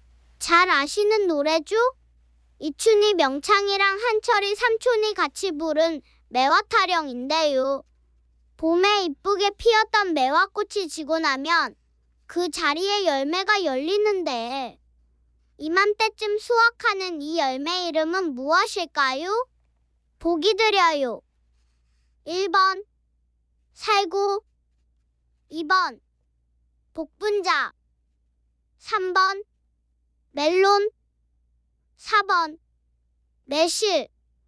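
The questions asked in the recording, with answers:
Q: 봄에 이쁘게 피었던 매화꽃이 지고 나면 그 자리에 열매가 열리는데 이맘때쯤 수확하는 이 열매 이름은 무엇일까요?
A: 4: 매실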